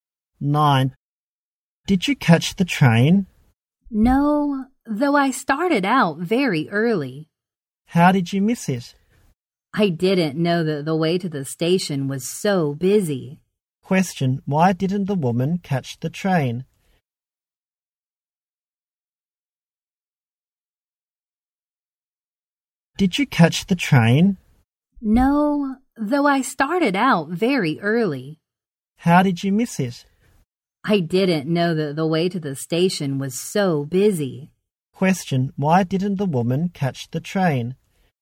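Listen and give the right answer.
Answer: The way to the station was very busy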